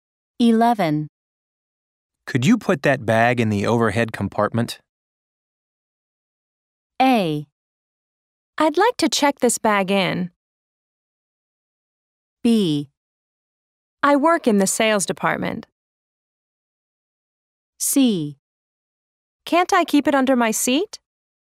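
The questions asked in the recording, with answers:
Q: Could you put that bag in the overhead compartment?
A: C: Can't I keep it under my seat?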